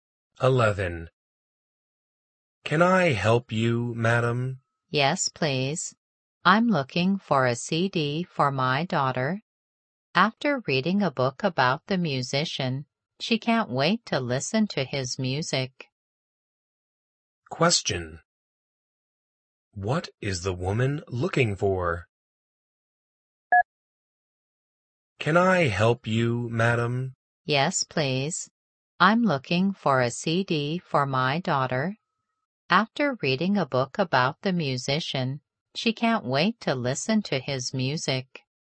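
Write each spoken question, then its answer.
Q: What is the woman looking for?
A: A CD for her daughter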